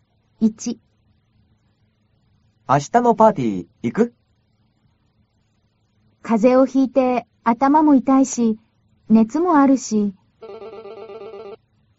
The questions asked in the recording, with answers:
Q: 明日のパーティー行く?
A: 風邪をひいて頭も痛いし、熱もあるし、行かないわ。